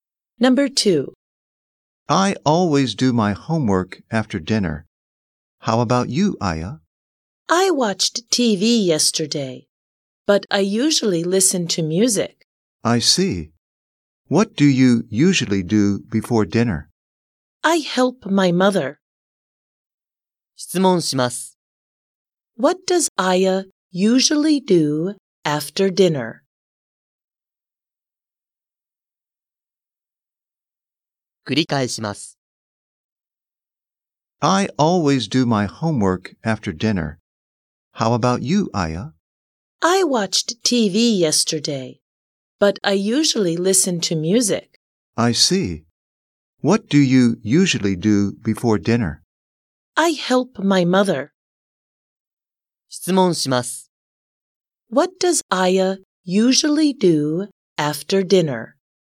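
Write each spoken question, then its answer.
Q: What does Aya usually do after dinner?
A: She listens to music.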